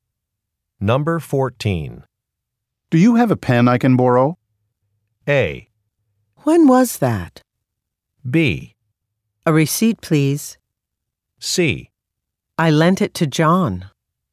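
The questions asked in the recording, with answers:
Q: Do you have a pen I can borrow?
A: C: I lent it to John.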